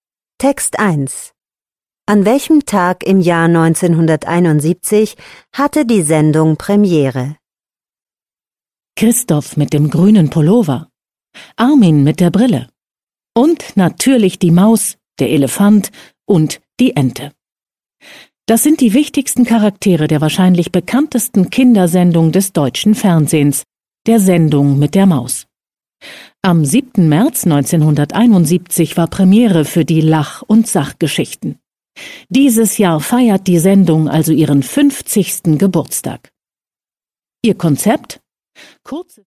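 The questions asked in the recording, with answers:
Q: An welchem Tag im Jahr 1971 hatte die Sendung Premiere?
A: Am 7. März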